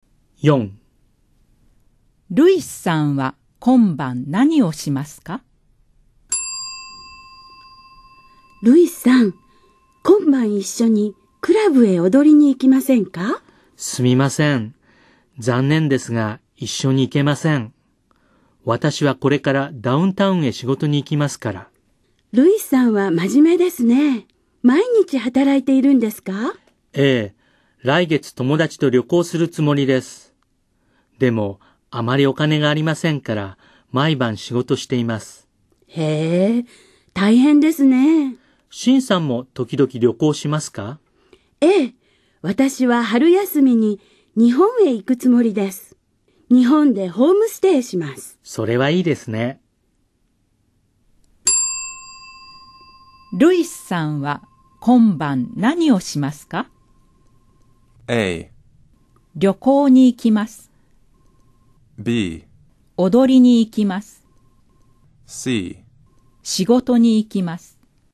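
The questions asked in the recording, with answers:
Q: ルイスさんは今晩何をしますか?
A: C: 仕事に行きます。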